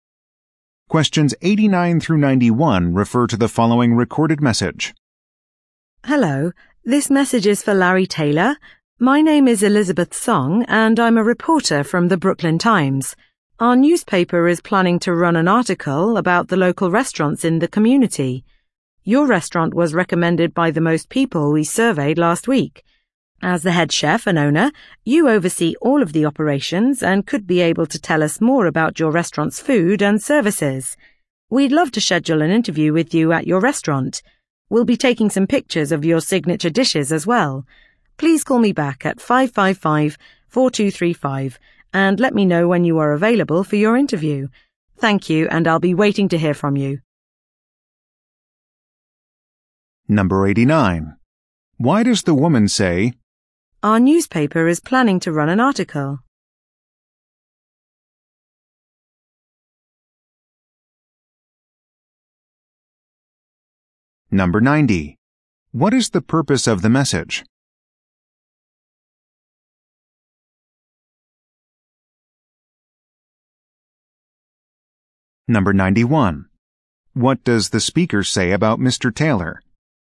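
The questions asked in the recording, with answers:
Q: What is the purpose of the message?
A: To schedule an interview at his restaurant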